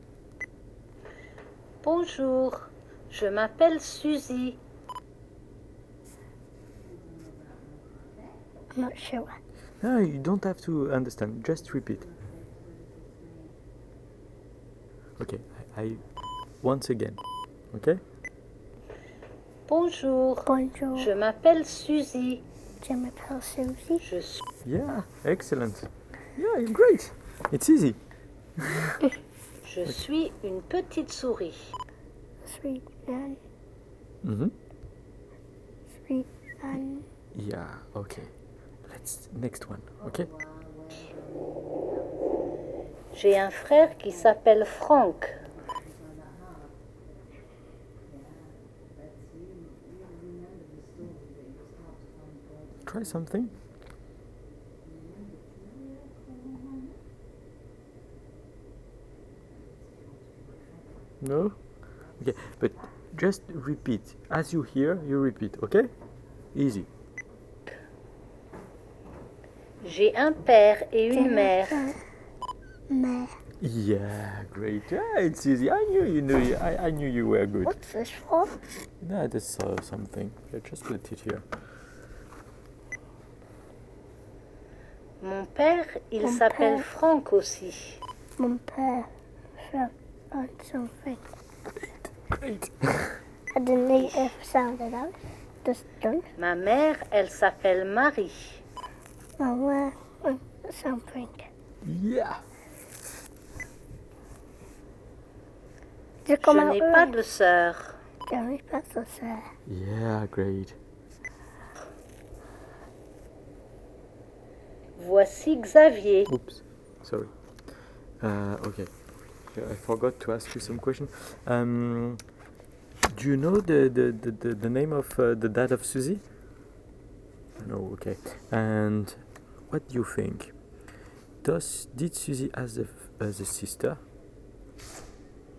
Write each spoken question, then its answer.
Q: Did Suzy as a sister?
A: No, she doesn't have a sister.